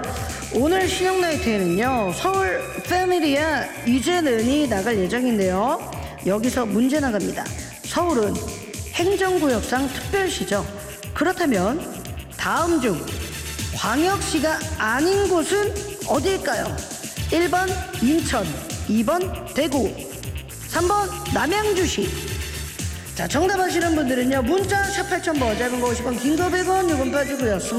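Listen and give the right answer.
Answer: 3번: 남양주시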